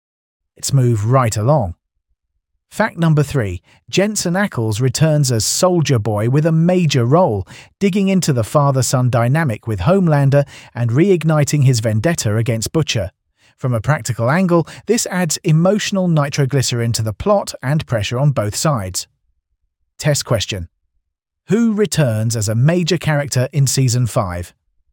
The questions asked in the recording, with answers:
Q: Who returns as a major character in Season 5?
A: Jensen Ackles as Soldier Boy.